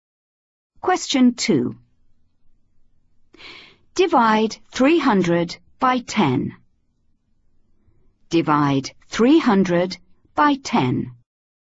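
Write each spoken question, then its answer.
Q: Divide 300 by 10.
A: 30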